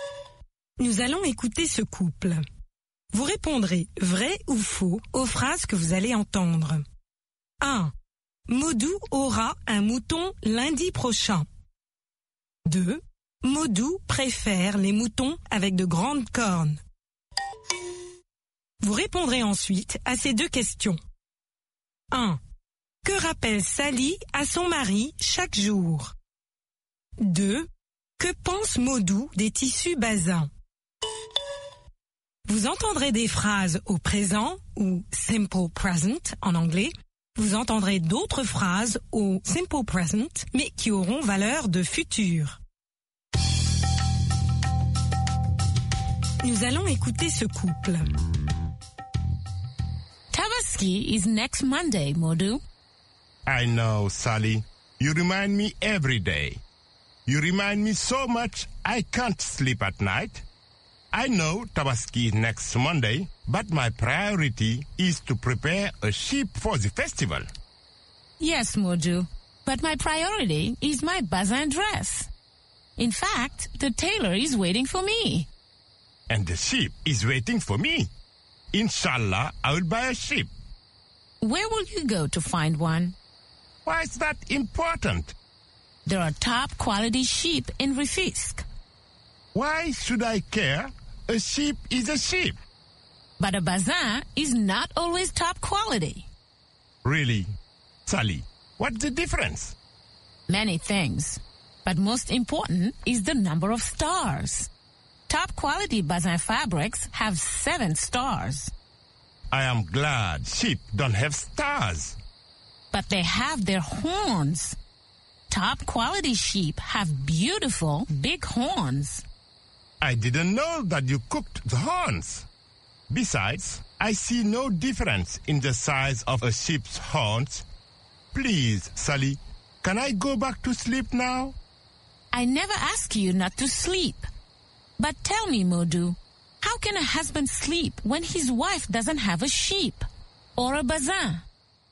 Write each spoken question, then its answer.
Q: Maudou aura un mouton lundi prochain.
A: L'énoncé 1 est vrai. Maudou aura un mouton lundi prochain.

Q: Maudou préfère les moutons avec de grandes cornes.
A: L'énoncé 2 est faux. Maudou préfère les moutons avec de grandes cornes.

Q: Que rappelle Sally à son mari chaque jour?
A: Sally rappelle chaque jour à son mari que la Tabaski est lundi prochain.